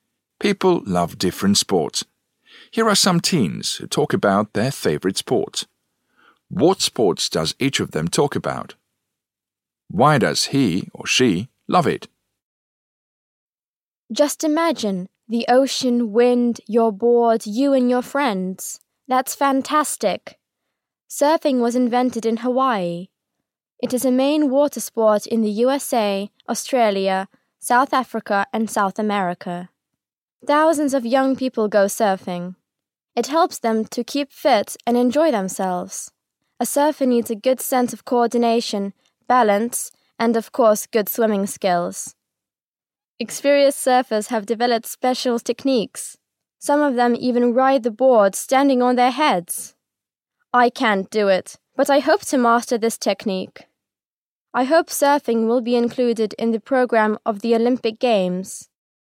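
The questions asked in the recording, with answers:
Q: What sports does each of them talk about?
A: Surfing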